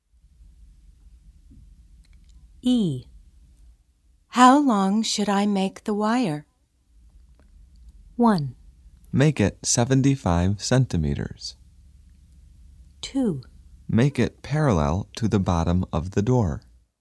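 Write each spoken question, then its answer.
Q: How long should I make the wire?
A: 1: Make it 75 centimeters.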